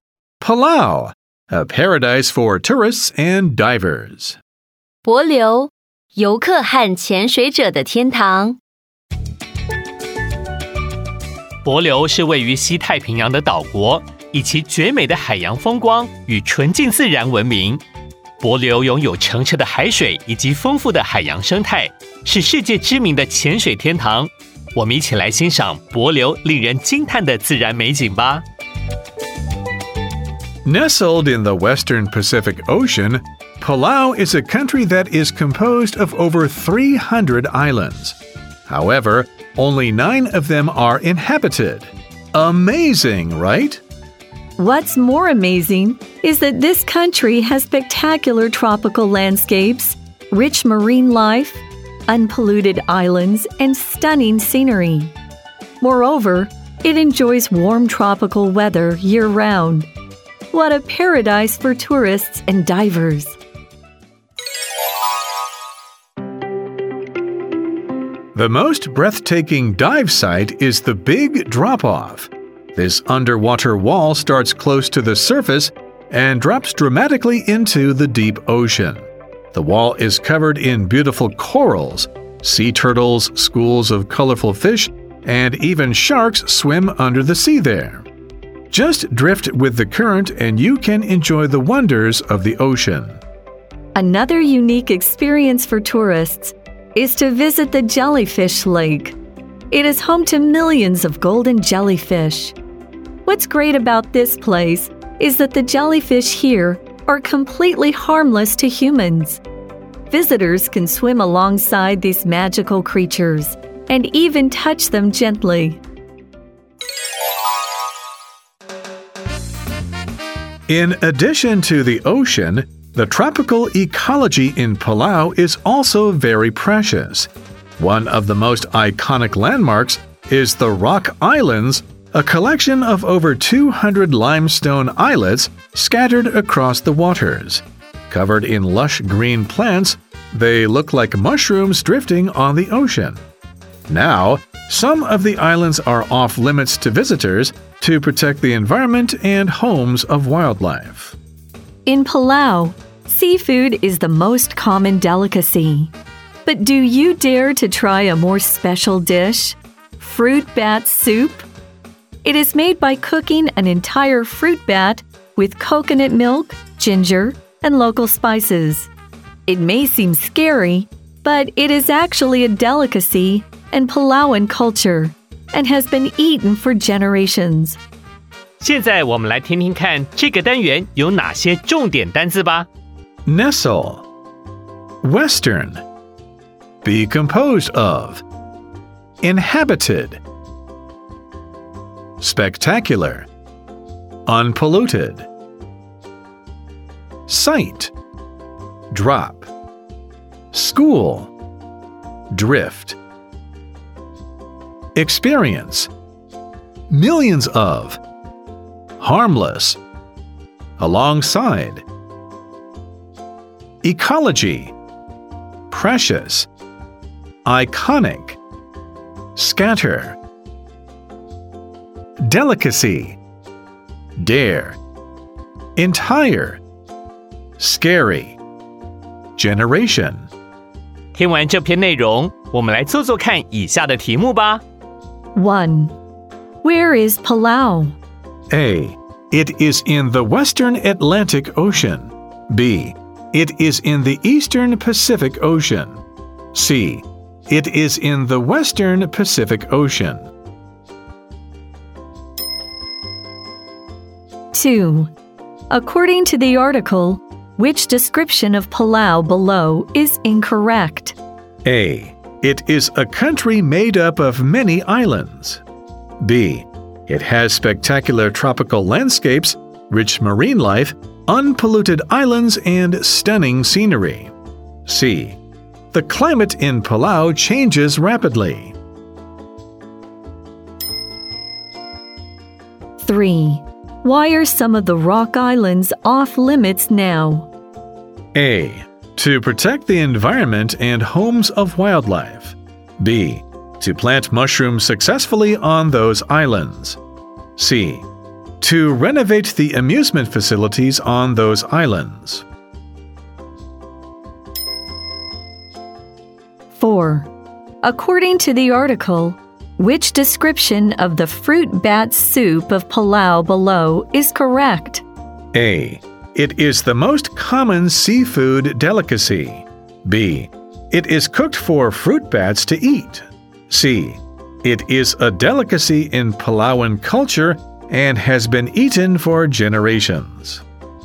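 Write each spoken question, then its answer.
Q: Where is Palau?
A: C: It is in the Western Pacific Ocean.

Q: According to the article, which description of Palau below is incorrect?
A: C: The climate in Palau changes rapidly.

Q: Why are some of the rock islands off limits now?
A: A: To protect the environment and homes of wildlife.

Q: According to the article, which description of the fruit bat soup of Palau below is correct?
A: C: It is a delicacy in Palauan culture and has been eaten for generations.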